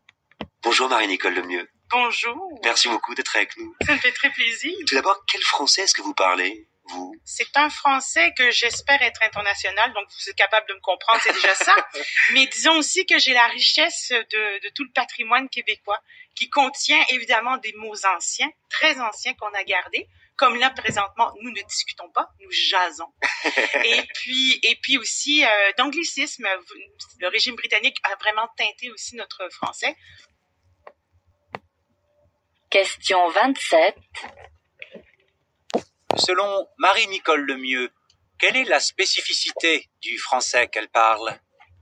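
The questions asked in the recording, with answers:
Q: Selon Marie-Nicole Lemieux, quelle est la spécificité du français qu'elle parle?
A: Un français international enrichi du patrimoine québécois : mots très anciens conservés et anglicismes dus au régime britannique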